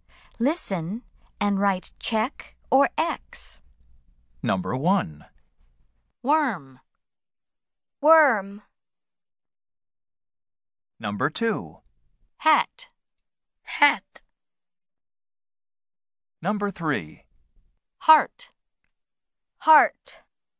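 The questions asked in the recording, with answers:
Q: Worm.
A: Yes (check): worm begins with W

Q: Heart.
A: No (X): heart does not begin with W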